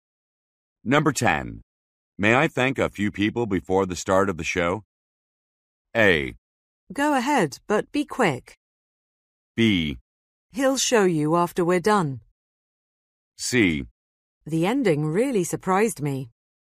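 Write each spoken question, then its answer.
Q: May I thank a few people before the start of the show?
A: A: Go ahead, but be quick.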